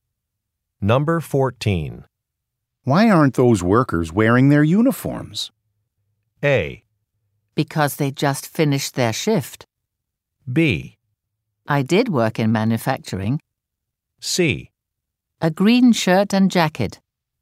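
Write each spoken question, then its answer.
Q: Why aren't those workers wearing their uniforms?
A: A: Because they just finished their shift.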